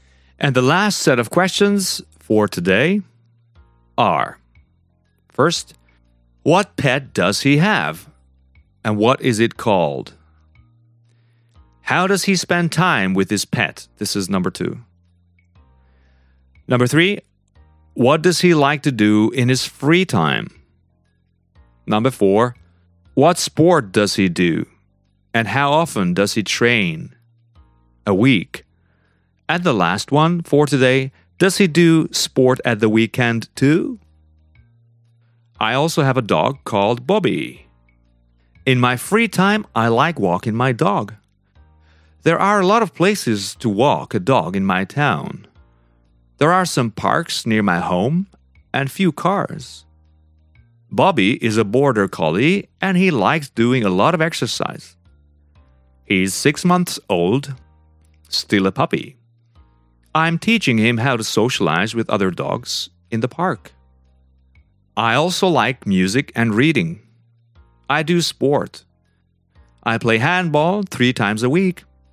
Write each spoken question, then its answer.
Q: what pet does he have?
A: He has a dog, a border collie, and the name of the dog is Bobby.

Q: How does he spend time with his pet?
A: He spends time with a pet, walking him in the park

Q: what does he like to do in his free time?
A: Yeah, he likes music and reading and sport.